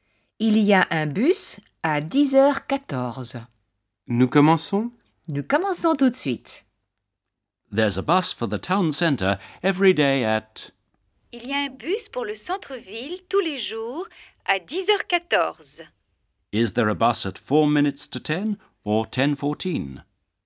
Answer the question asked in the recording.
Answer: There's a bus at 10:14, 14 minutes past 10.